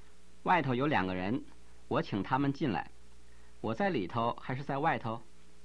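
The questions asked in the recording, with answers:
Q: 我在里头还是在外头?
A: 在里头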